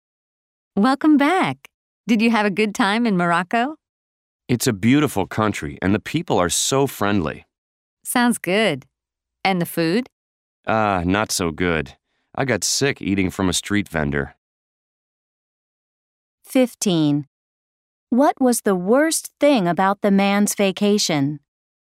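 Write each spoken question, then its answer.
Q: What was the worst thing about the man's vacation?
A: The food; he got sick eating from a street vendor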